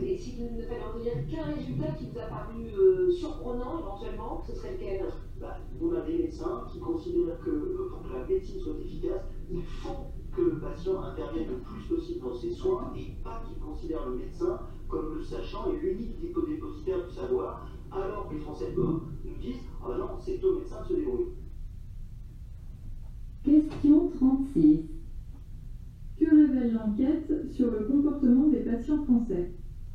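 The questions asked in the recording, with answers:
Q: Que révèle l'enquête sur le comportement des patients français?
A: Ils ne veulent pas participer activement à leurs soins : pour eux, c'est au médecin de se débrouiller.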